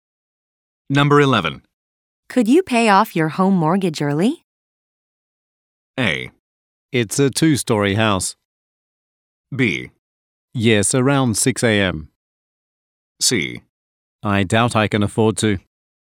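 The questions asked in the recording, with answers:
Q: Could you pay off your home mortgage early?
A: C: I doubt I can afford to.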